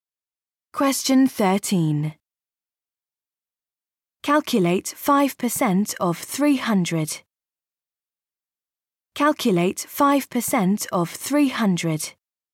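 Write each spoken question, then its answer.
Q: Calculate 5% of 300.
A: 15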